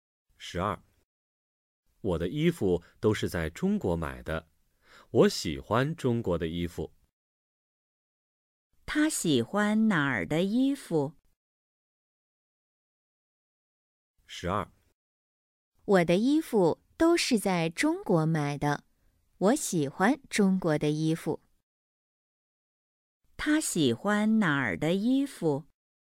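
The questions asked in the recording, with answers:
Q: 他喜欢哪儿的衣服?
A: 中国的衣服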